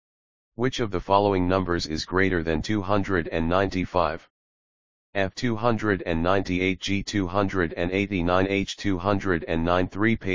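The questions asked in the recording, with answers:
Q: Which of the following numbers is greater than 295?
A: F: 298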